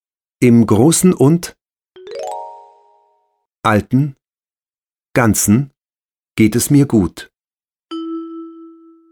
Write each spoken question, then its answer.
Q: Im Großen und Alten, Ganzen geht es mir gut.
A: Im Großen und Ganzen geht es mir gut.